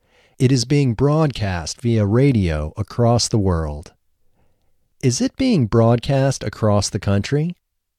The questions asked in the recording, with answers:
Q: Is it being broadcast across the country?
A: No, it isn't being broadcast across the country.